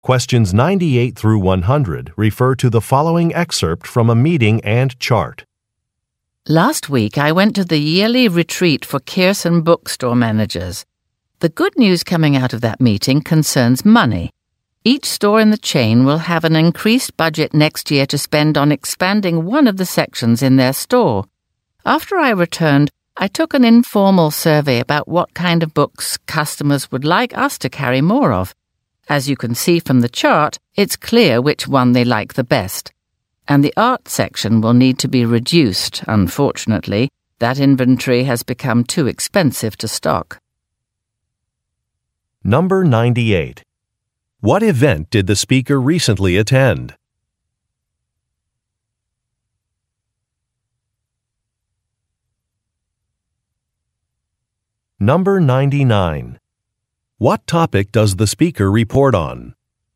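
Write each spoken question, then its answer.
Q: What event did the speaker recently attend?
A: A yearly retreat for bookstore managers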